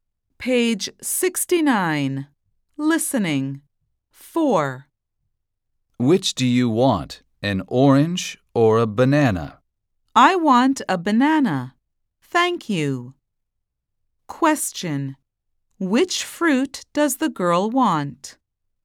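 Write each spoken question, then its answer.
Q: Which fruit does the girl want?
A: a banana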